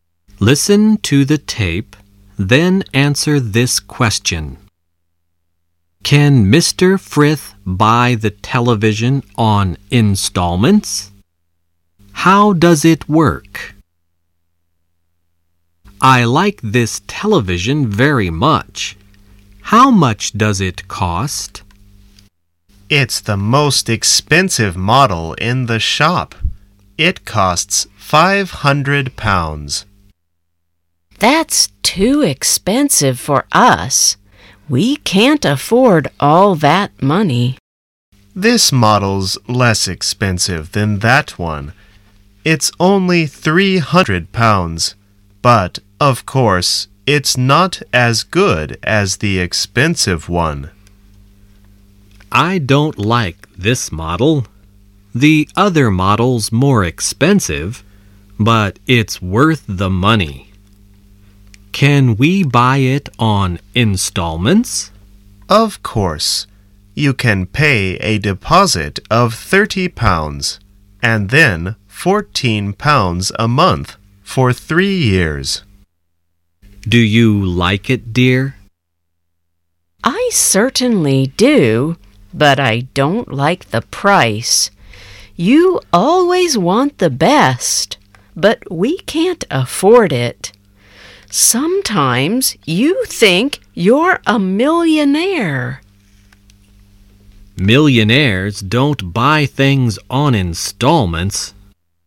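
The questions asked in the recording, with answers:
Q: Can Mr. Frith buy the television on installments?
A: Yes, he can pay a deposit of £30 and then £14 a month for 3 years.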